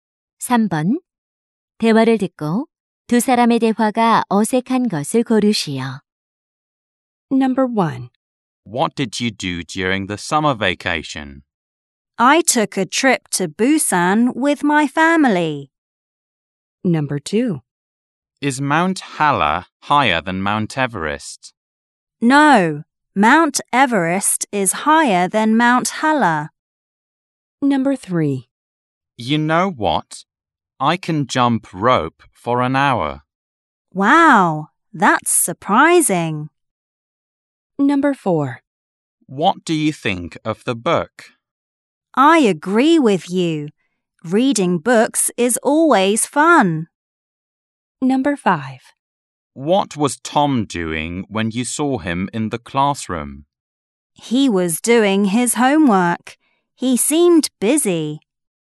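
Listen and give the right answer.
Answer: 4: What do you think of the book? / I agree with you.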